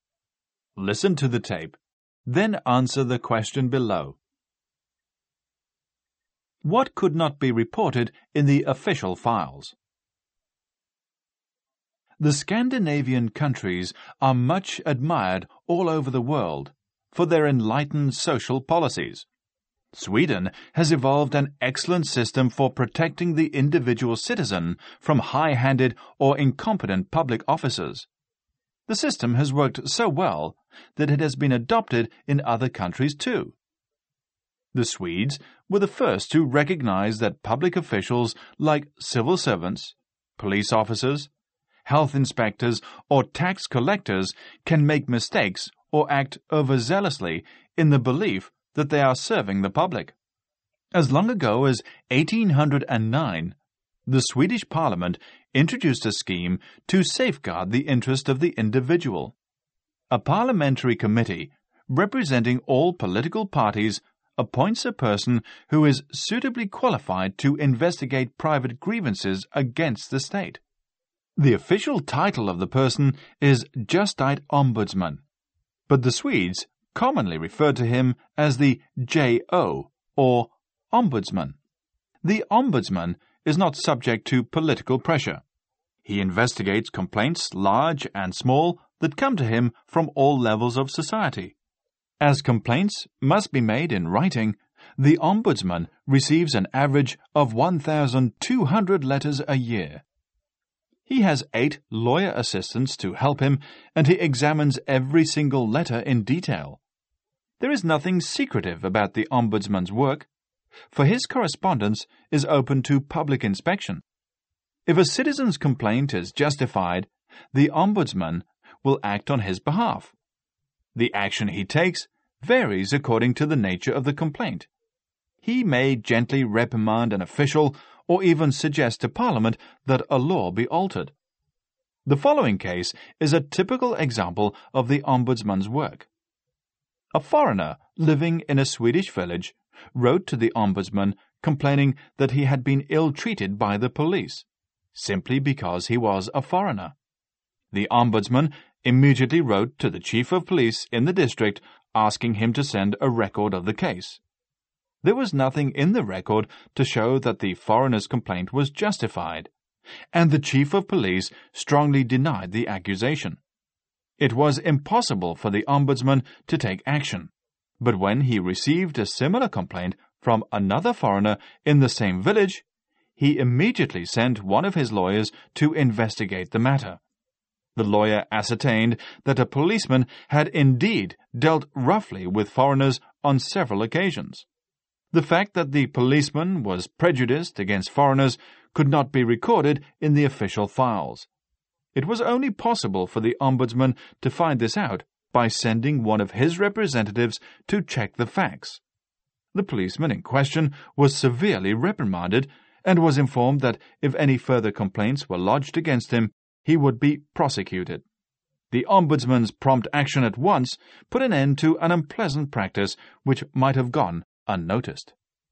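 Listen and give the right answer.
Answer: The fact that the policeman was prejudiced against foreigners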